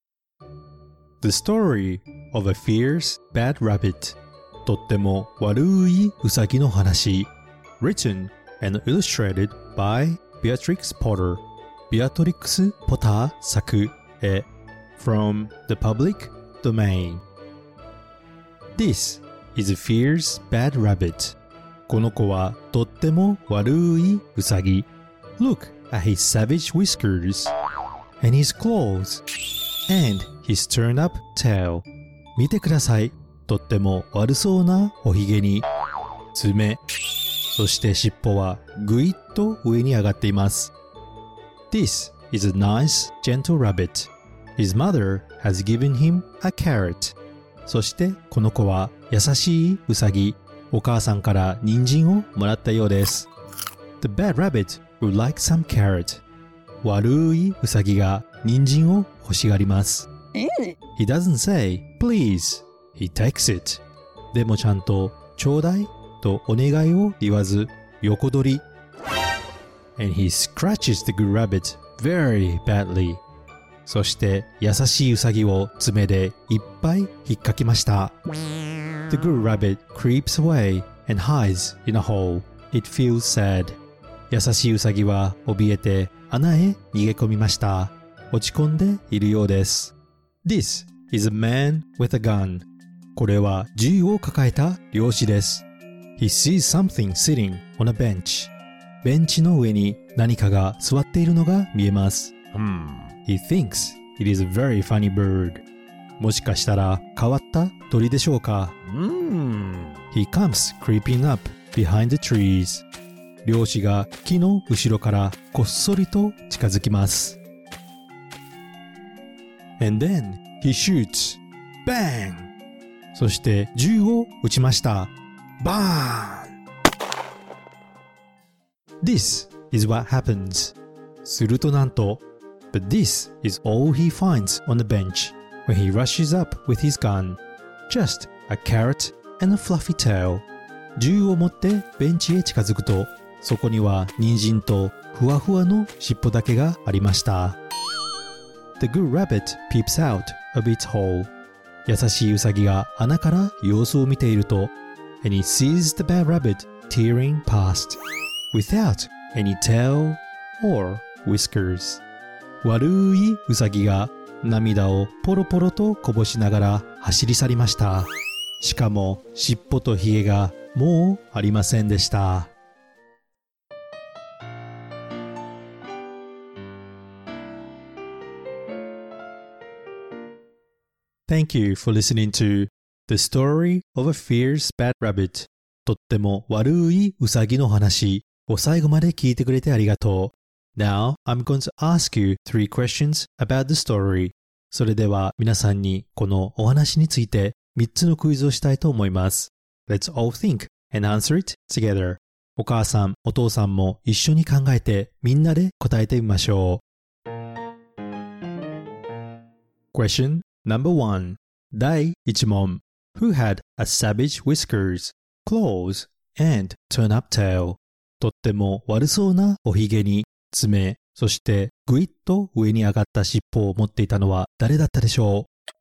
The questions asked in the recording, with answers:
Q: who had a savage whiskers, claws, and turn up tail.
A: It was a fierce bad rabbit とっても悪いウサギです